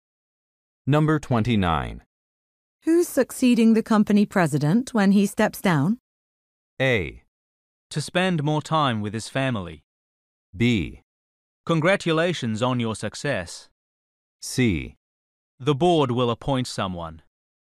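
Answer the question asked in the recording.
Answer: C: The board will appoint someone.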